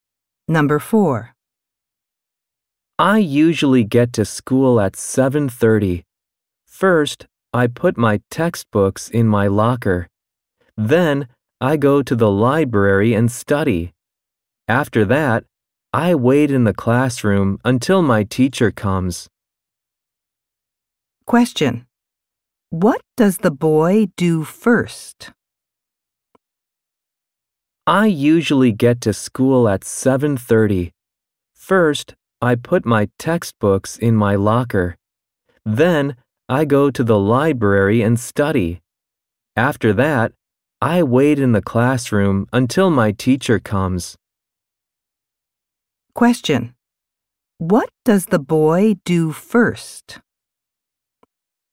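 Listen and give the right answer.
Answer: He puts his textbooks in his locker.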